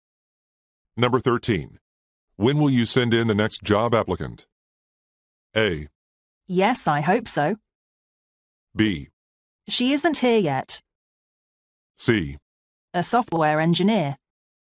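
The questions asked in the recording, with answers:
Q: When will you send in the next job applicant?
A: B: She isn't here yet.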